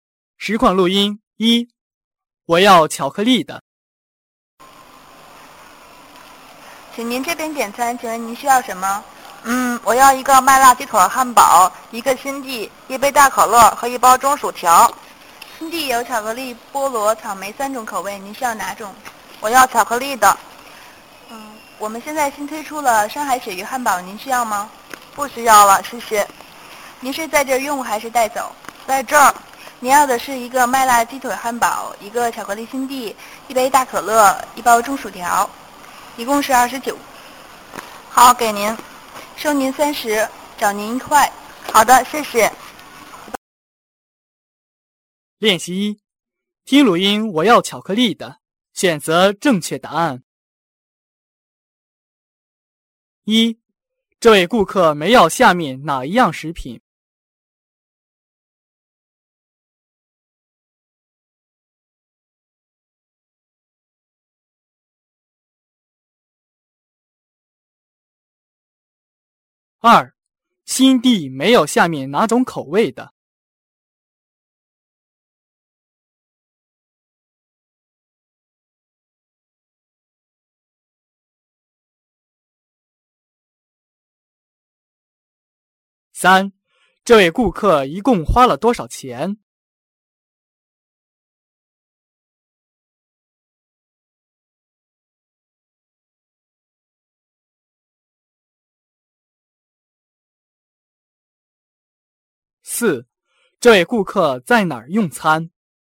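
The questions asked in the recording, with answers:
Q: 这位顾客一共花了多少钱?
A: 29块

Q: 这位顾客在哪儿用餐?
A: 在这儿(店里)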